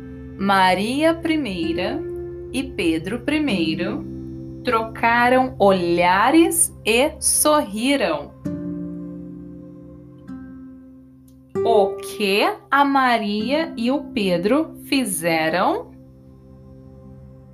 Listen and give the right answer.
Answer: trocaram olhares e sorriram.